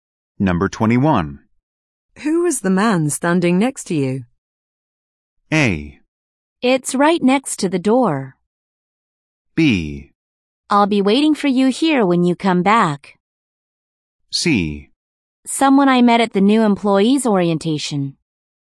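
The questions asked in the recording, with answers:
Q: Who was the man standing next to you?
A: C: Someone I met at the new employee's orientation.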